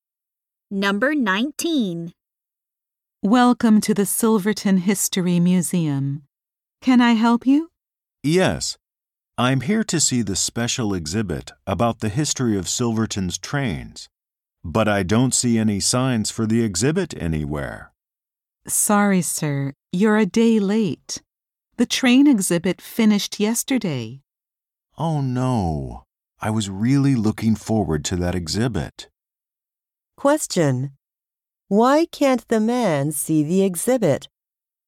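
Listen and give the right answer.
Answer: The exhibit finished yesterday.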